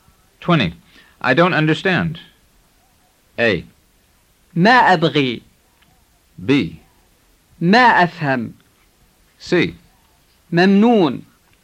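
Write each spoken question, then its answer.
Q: I don't understand.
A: B: ما أفهم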